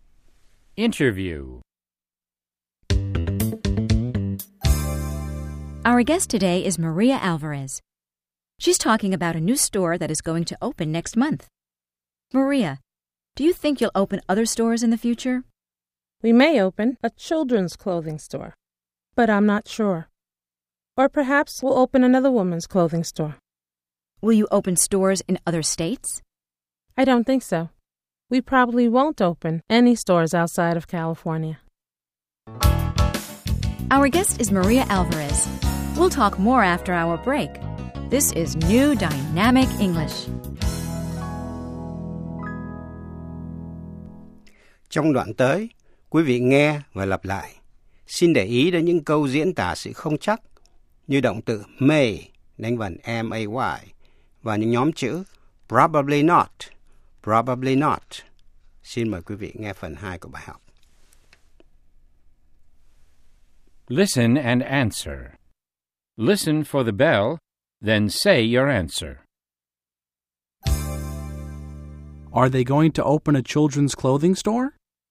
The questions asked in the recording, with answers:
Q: Are they going to open a children's clothing store?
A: They may open a children's clothing store, but they're not sure.